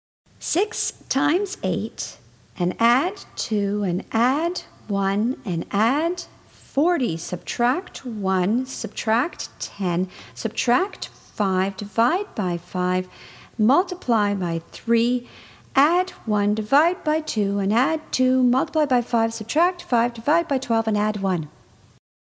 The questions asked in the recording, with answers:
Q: 6 times 8, and add 2, and add 1, and add 40, subtract 1, subtract 10, subtract 5, divide by 5, multiply by 3, add 1, divide by 2, and add 2, multiply by 5, subtract 5, divide by 12, and add 1.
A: And the answer is 11.